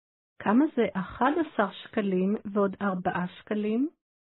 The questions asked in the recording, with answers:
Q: כמה זה 11 שקלים ועוד 4 שקלים?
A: 15 שקלים.